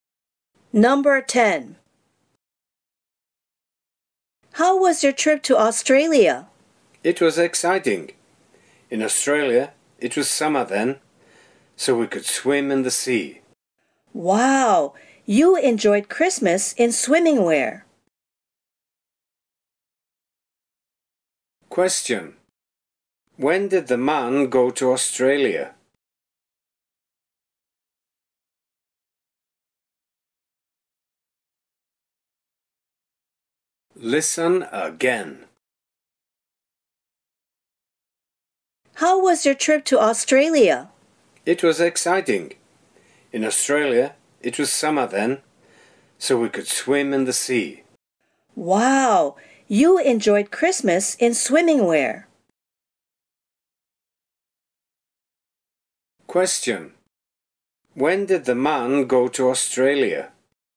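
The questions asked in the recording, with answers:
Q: When did the man go to Australia?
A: At Christmas (in December)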